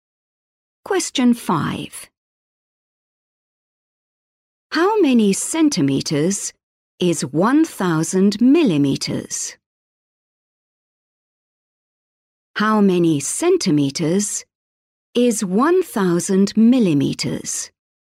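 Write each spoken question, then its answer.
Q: How many centimeters is 1,000 millimeters?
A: 100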